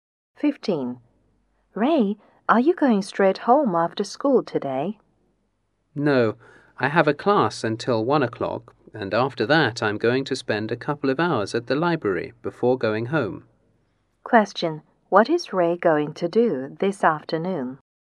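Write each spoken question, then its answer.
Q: What is Ray going to do this afternoon?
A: Attend a class until 1 and then spend a couple of hours at the library.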